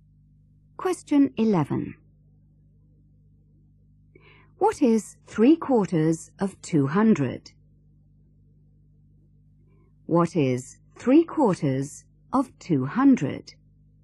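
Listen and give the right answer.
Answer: 150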